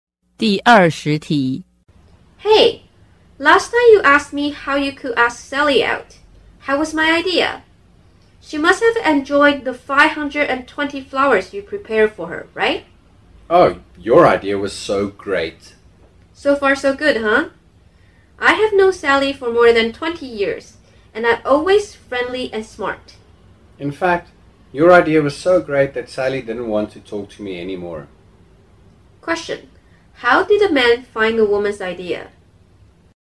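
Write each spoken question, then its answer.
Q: How did a man find a woman's idea?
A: Terrible; it did not work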